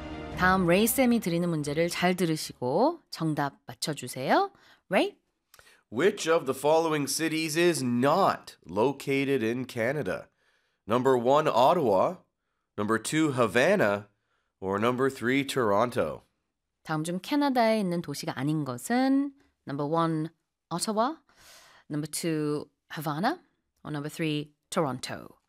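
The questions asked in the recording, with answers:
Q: Which of the following cities is not located in Canada?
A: 2: Havana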